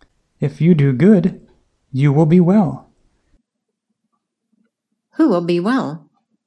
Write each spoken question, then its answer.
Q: Who will be well?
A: Cain will be well.